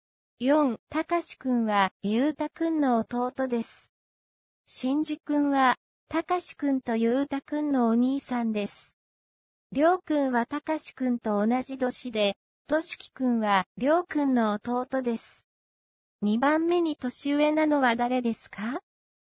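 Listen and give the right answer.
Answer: ゆうたくん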